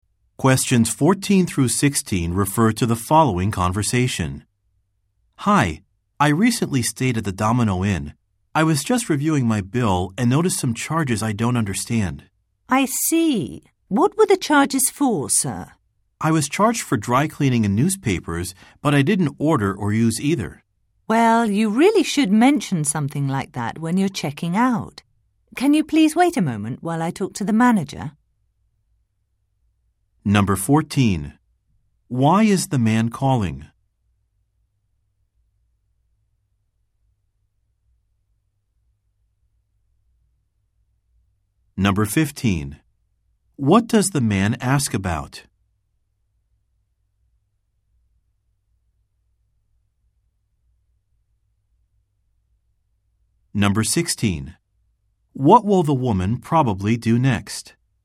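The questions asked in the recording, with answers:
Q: Why is the man calling?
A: To ask about charges on his hotel bill that he doesn't understand

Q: What does the man ask about?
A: Charges for dry cleaning and newspapers he didn't use

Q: What will the woman probably do next?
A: Talk to the manager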